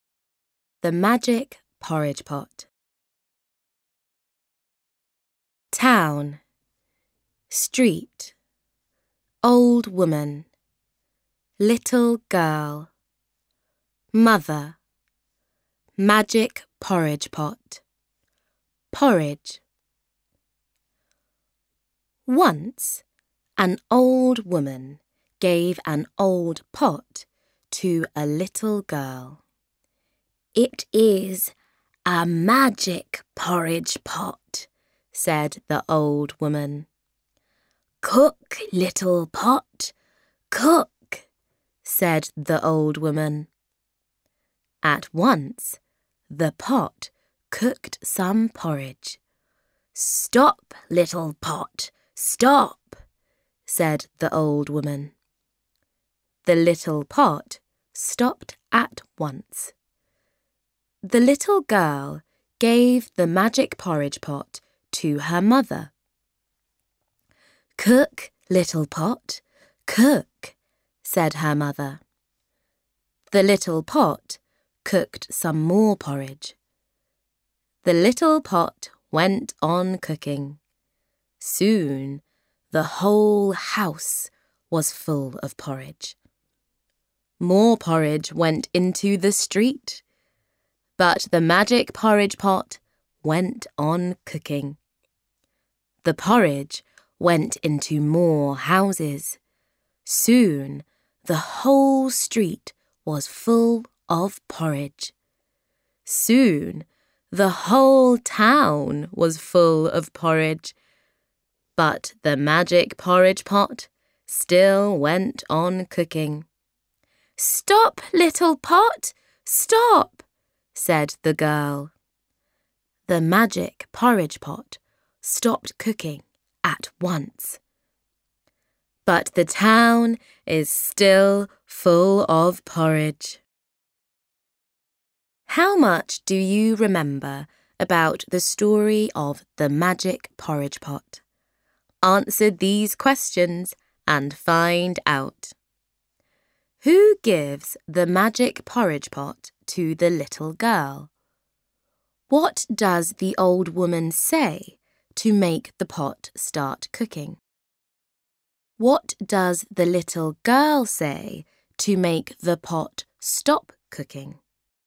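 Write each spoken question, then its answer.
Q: Who gives the magic porridge pot to the little girl?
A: An old woman

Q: What does the old woman say to make the pot start cooking?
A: Cook, little pot, cook

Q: What does the little girl say to make the pot stop cooking?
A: Stop, little pot, stop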